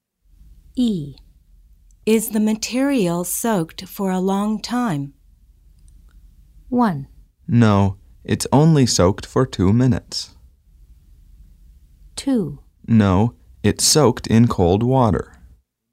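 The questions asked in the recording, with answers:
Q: Is the material soaked for a long time?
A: 1: No, it's only soaked for 2 minutes.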